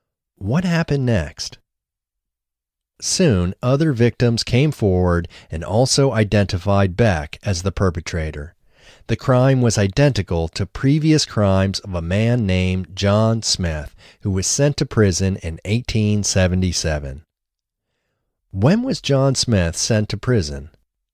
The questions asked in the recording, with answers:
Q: When was John Smith sent to prison?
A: John Smith was sent to prison in 1877.